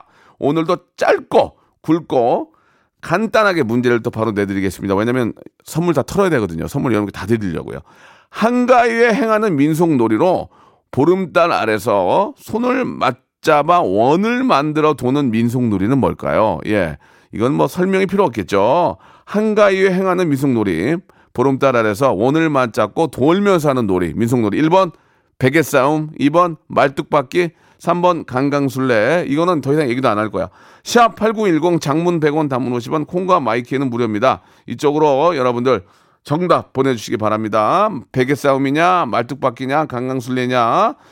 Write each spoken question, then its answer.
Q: 한가위에 행하는 민속놀이로 보름달 아래서 손을 맞잡아 원을 만들어 도는 민속놀이는 뭘까요?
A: 자, 정답은 강강술래죠.